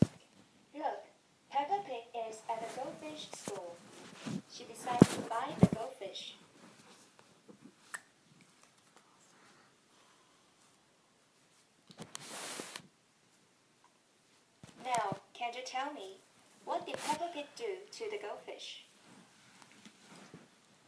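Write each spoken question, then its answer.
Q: Can you tell me, what did Peppa Pig do to the goldfish?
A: She bought the goldfish.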